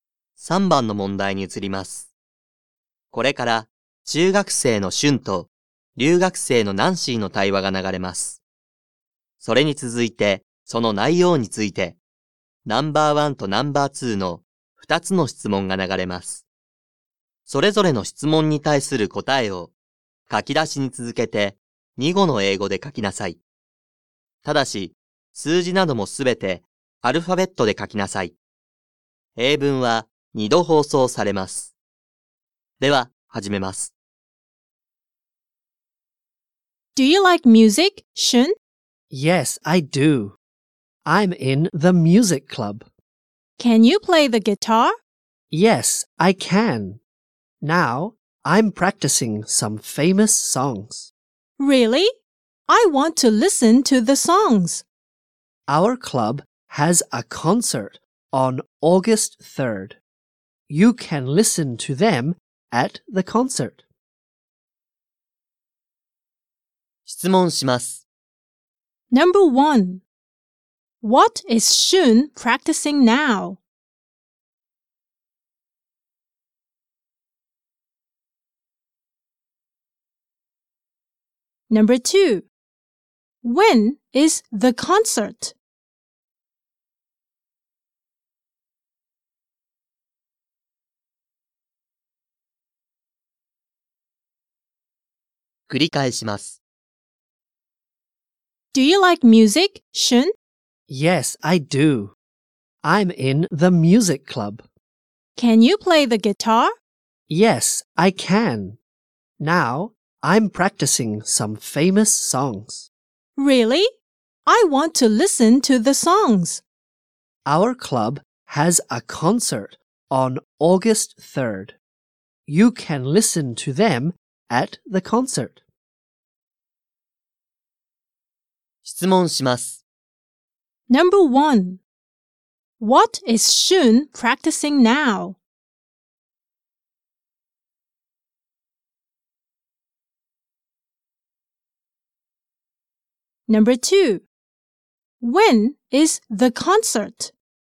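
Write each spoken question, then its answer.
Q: What is Shun practicing now?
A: Famous songs

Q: When is the concert?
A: August third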